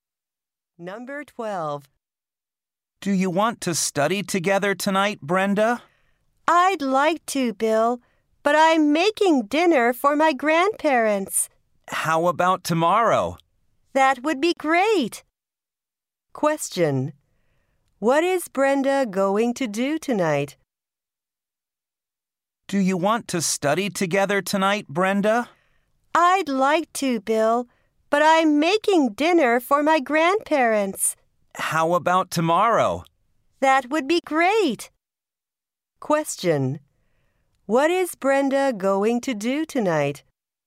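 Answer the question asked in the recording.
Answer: Make dinner for her grandparents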